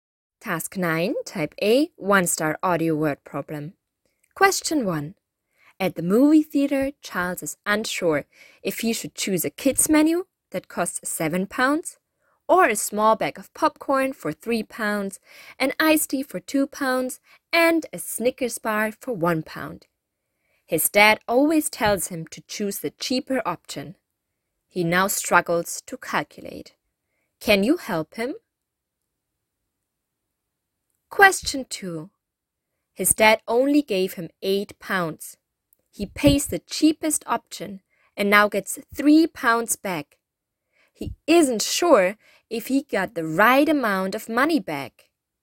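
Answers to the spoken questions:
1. Choose the popcorn, iced tea and Snickers (£6), cheaper than the £7 kid's menu
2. No, he should get £2 back, not £3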